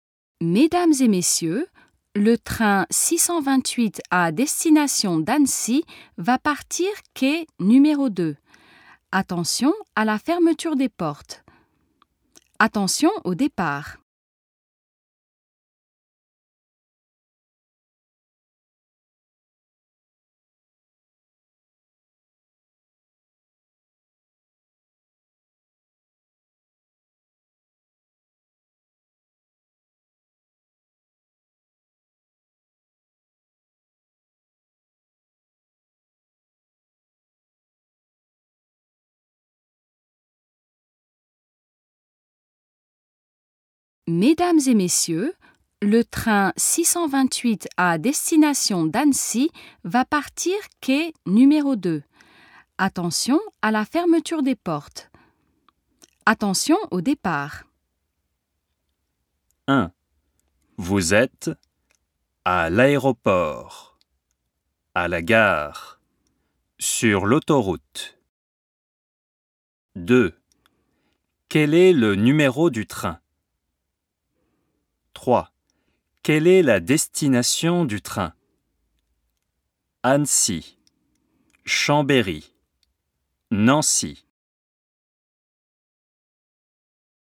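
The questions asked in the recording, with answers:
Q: Vous êtes à l'aéroport, à la gare, sur l'autoroute.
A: à la gare

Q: Quel est le numéro du train ?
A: 628

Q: Quelle est la destination du train ?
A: Annecy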